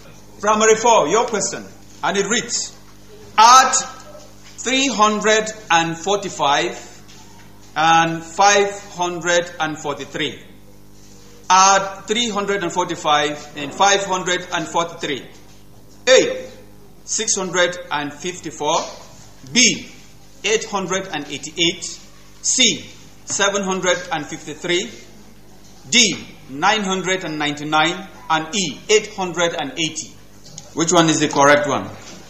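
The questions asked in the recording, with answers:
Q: Add 345 and 543.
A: B: 888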